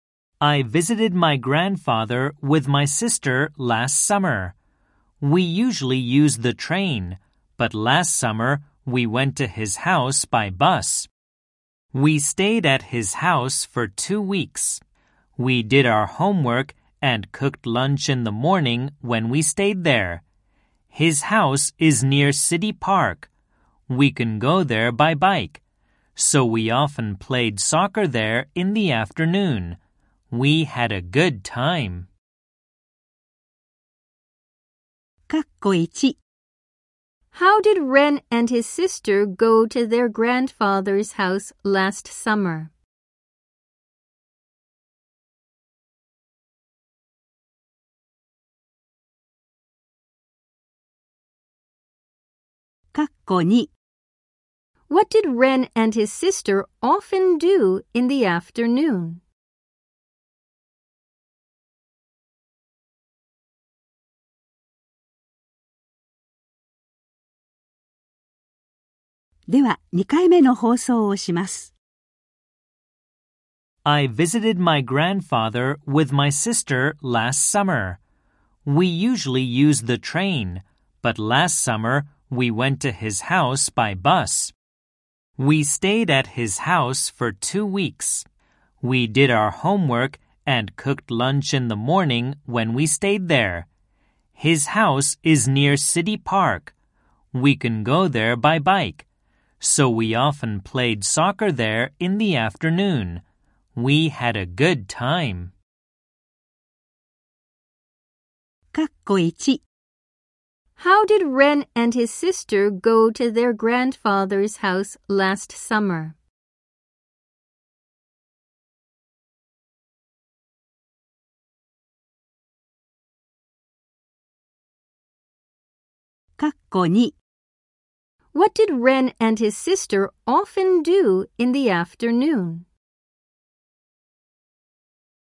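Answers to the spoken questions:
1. By bus
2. They played soccer (in City Park)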